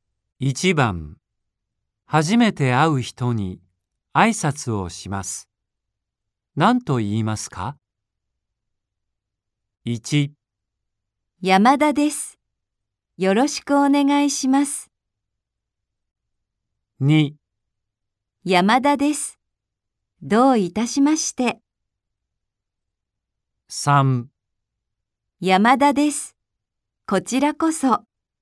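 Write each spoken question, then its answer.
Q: 初めて会う人に挨拶をします。何と言いますか ?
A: 1: 山田です。よろしくお願いします。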